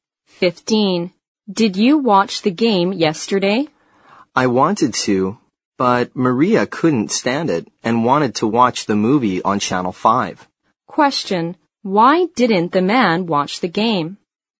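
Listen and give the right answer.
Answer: Because Maria wanted to watch the movie on Channel 5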